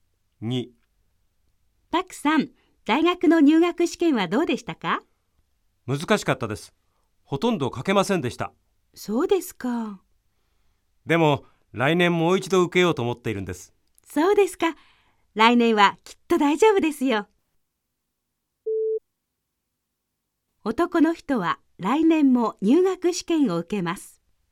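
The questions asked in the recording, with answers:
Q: 男の人は来年も入学試験を受けます。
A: ○(正しい)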